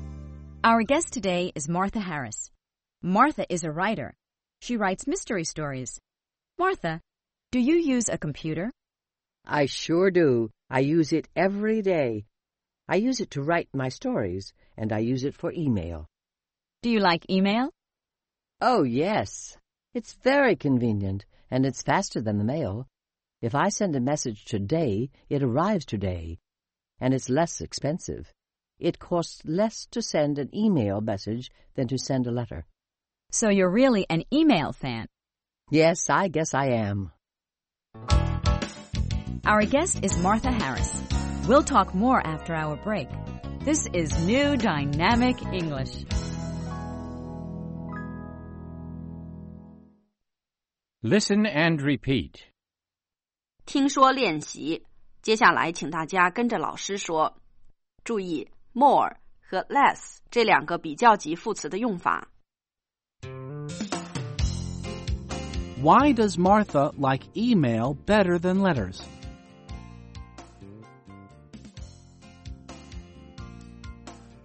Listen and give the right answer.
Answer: It's faster.